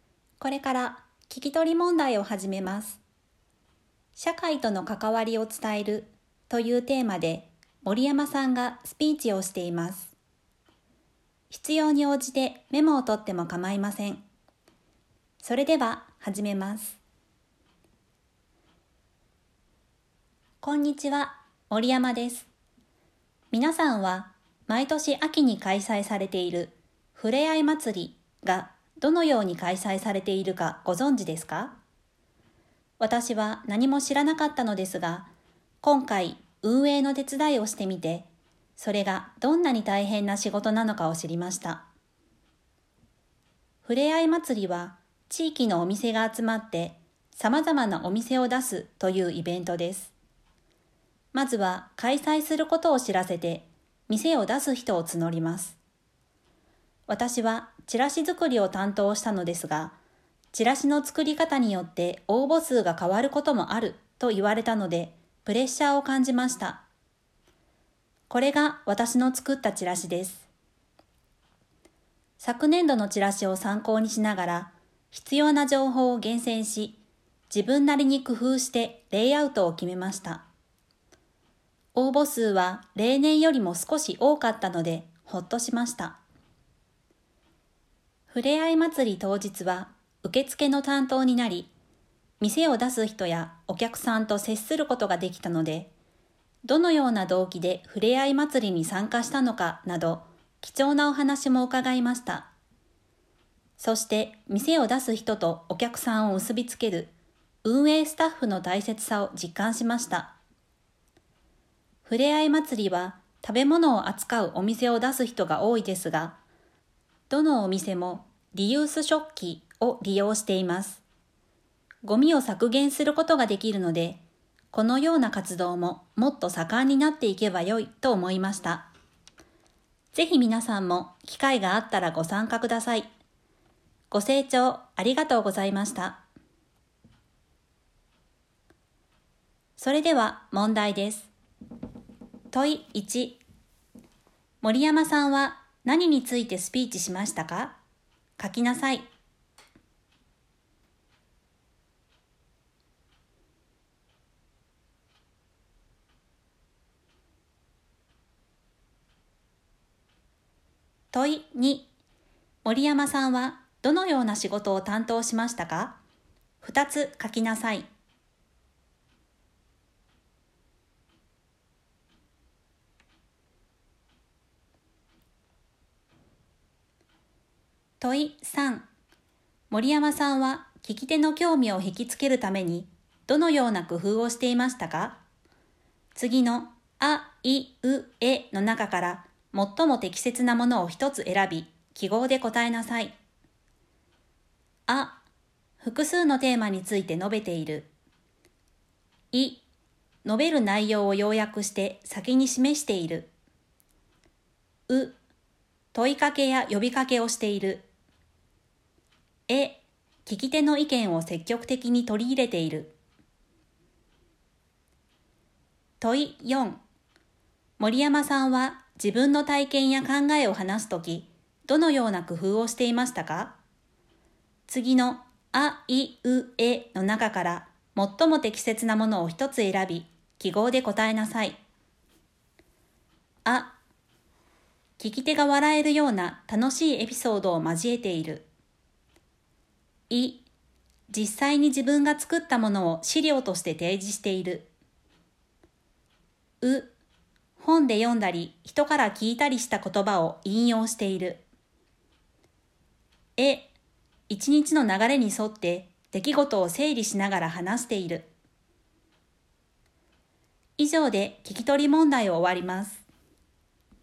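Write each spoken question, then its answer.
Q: 森山さんはどのような仕事を担当しましたか?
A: チラシ作りと当日の受付

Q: 森山さんは聞き手の興味を引きつけるためにどのような工夫をしていましたか?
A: う、問いかけや呼びかけをしている。

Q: 森山さんは自分の体験や考えを話すとき、どのような工夫をしていましたか?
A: い、実際に自分が作ったものを資料として提示している。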